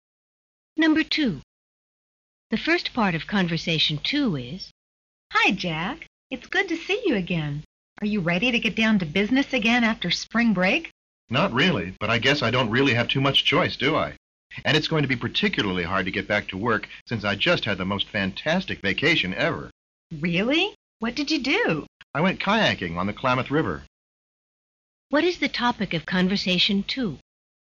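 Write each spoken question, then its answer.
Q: What is the topic of conversation two?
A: A kayaking trip on the Klamath River during spring break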